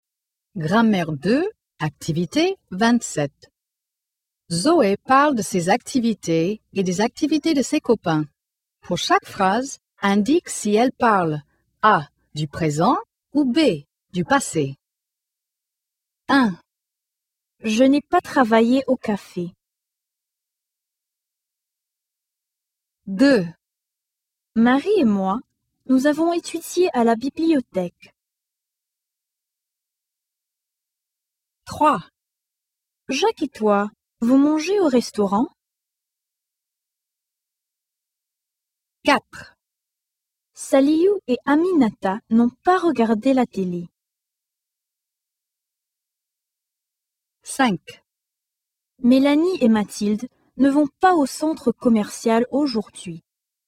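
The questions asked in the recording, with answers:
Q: Je n'ai pas travaillé au café.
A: B: du passé

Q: Marie et moi, nous avons étudié à la bibliothèque.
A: B: du passé

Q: Jacques et toi, vous mangez au restaurant?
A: A: du présent

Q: Saliou et Aminata n'ont pas regardé la télé.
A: B: du passé

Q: Mélanie et Mathilde ne vont pas au centre commercial aujourd'hui.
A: A: du présent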